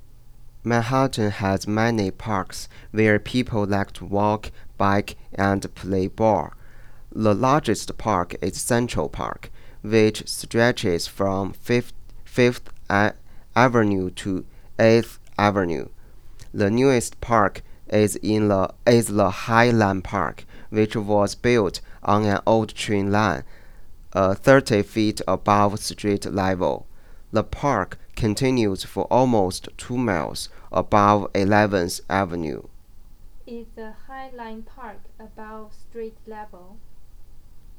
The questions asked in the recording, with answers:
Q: Is the Highline Park above street level?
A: Oh, yes.